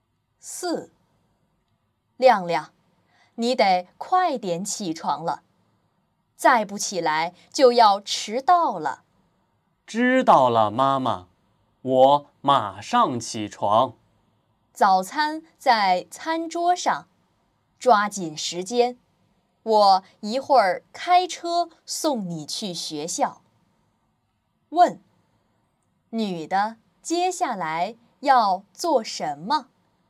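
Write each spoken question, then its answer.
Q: 问,女的接下来要做什么?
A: 开车送孩子去学校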